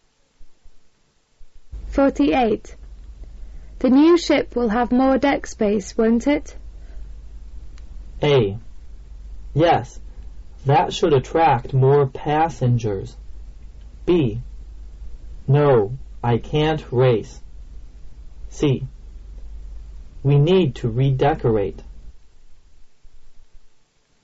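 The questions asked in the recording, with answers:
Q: The new ship will have more deck space, won't it?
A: A: Yes, that should attract more passengers.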